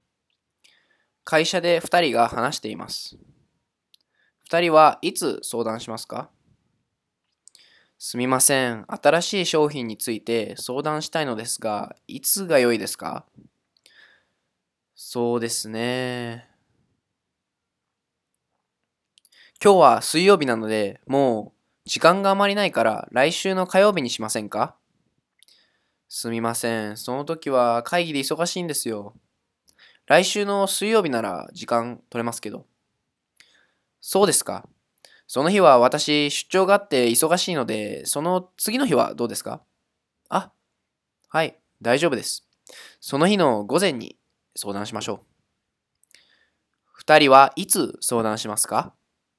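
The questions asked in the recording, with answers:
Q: 二人はいつ相談しますか?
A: 来週の木曜日の午前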